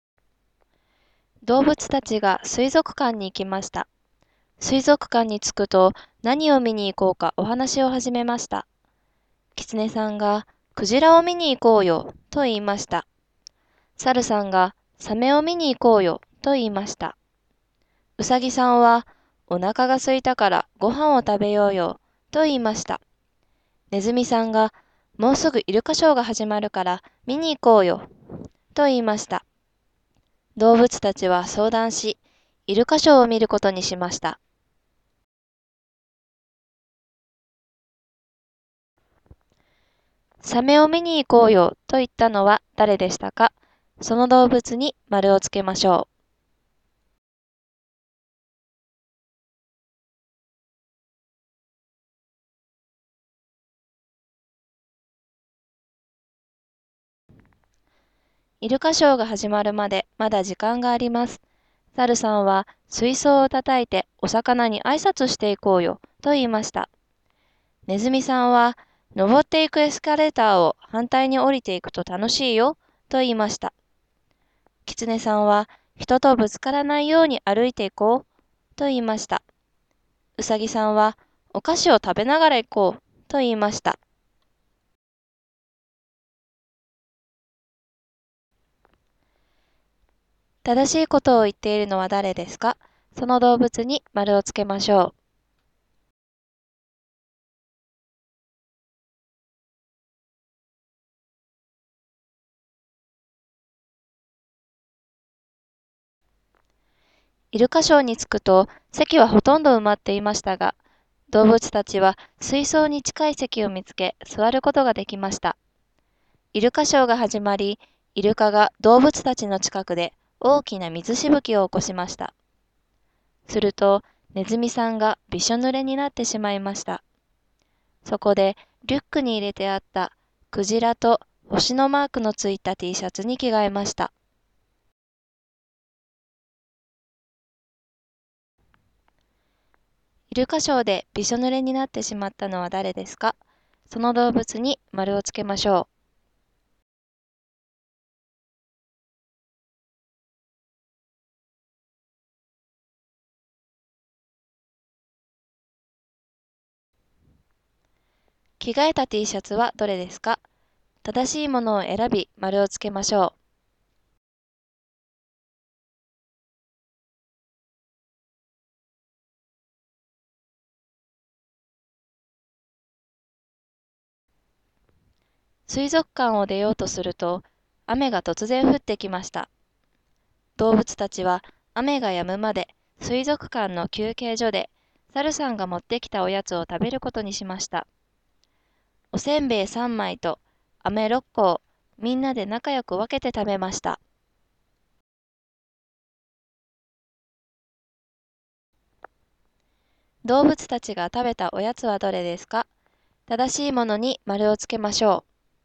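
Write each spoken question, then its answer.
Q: サメを見に行こうよと言ったのは誰でしたか?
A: 猿さん

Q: 正しいことを言っているのは誰ですか?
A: キツネさん

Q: イルカショーでびしょ濡れになってしまったのは誰ですか?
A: ネズミさん

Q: 着替えた T シャツはどれですか?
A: クジラと星のマークのついたTシャツ

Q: 動物たちが食べたおやつはどれですか?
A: おせんべい3枚と飴6個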